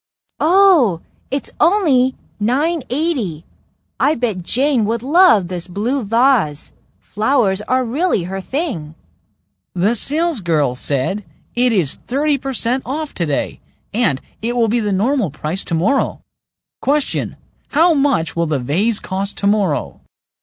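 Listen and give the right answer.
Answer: $14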